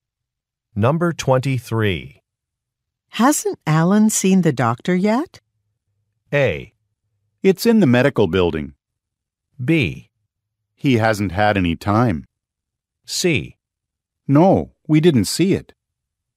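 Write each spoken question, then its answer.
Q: Hasn't Alan seen the doctor yet?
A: B: He hasn't had any time.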